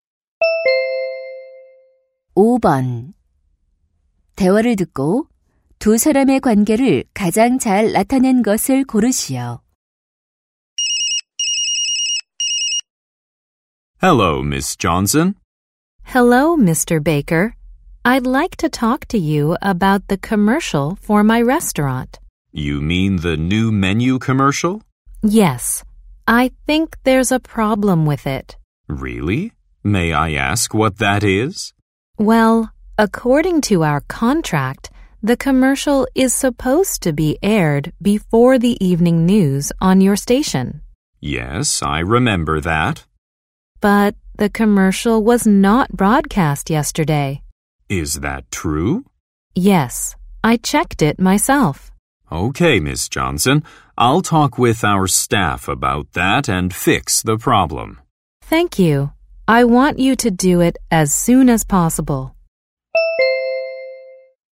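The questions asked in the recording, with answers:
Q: 대화를 듣고 두 사람의 관계를 가장 잘 나타낸 것을 고르시오.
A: 식당 주인 - 방송국 광고 담당자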